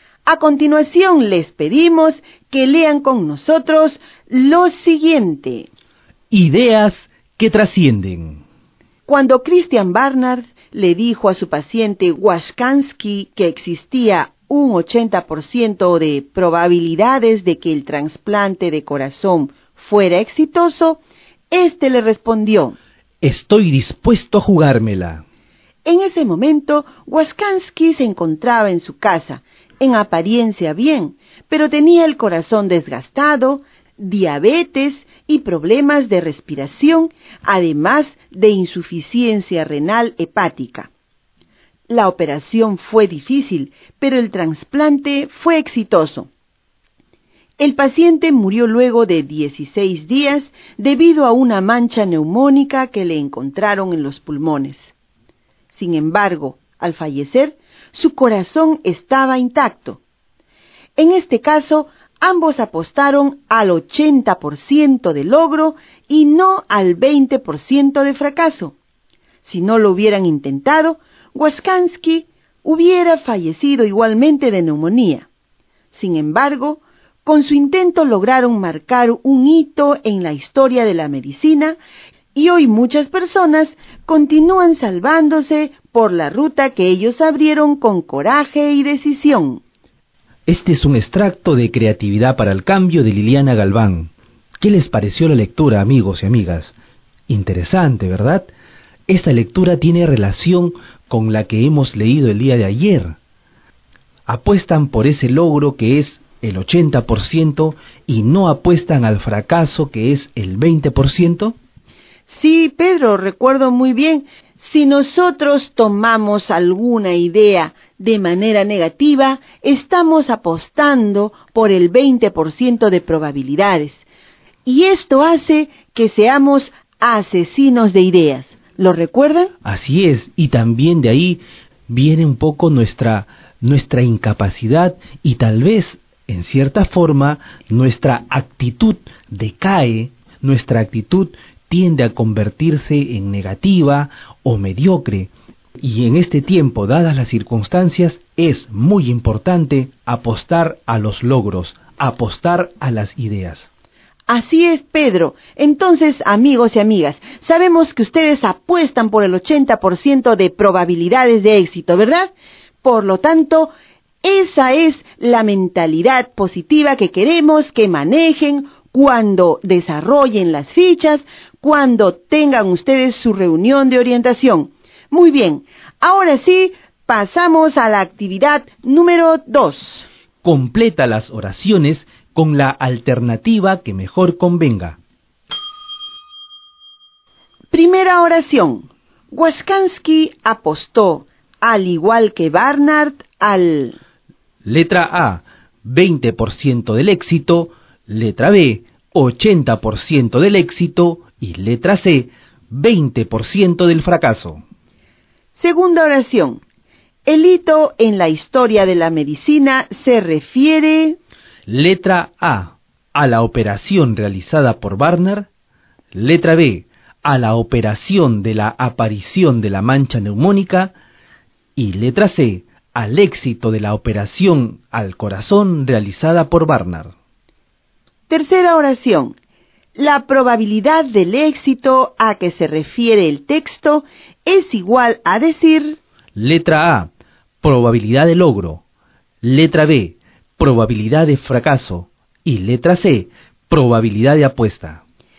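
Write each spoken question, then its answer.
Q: Waskansky apostó, al igual que Barnard, al...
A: B: 80% del éxito

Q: El hito en la historia de la medicina se refiere...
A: C: al éxito de la operación al corazón realizada por Barnard

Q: La probabilidad del éxito a que se refiere el texto es igual a decir...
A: A: probabilidad de logro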